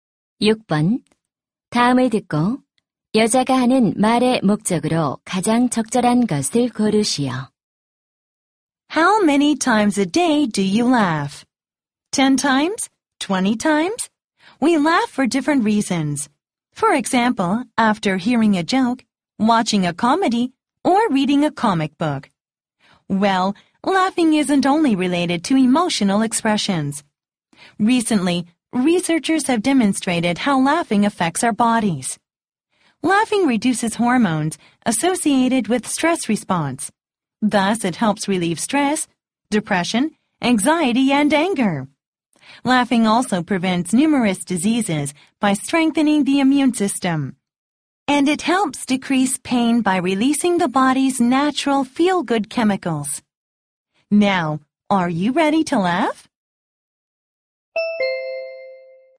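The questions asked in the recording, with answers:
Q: 다음을 듣고 여자가 하는 말의 목적으로 가장 적절한 것을 고르시오.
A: 웃음의 효과를 알리려고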